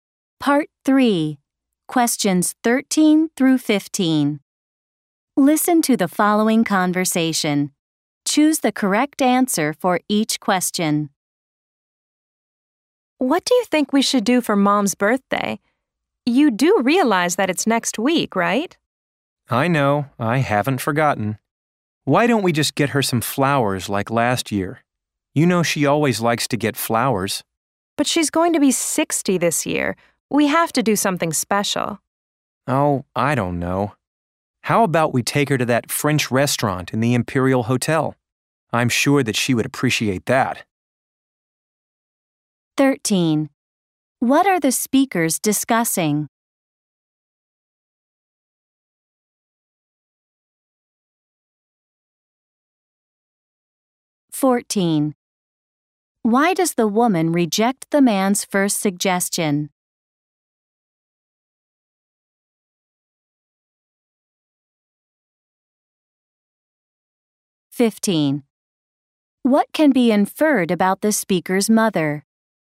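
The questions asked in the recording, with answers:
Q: What are the speakers discussing?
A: What to do for their mom's birthday

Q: Why does the woman reject the man's first suggestion?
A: Their mom is turning 60, so they should do something special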